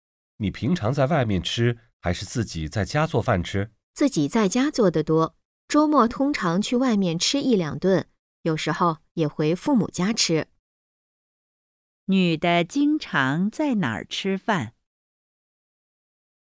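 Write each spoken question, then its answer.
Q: 女的经常在哪儿吃饭?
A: 自己家里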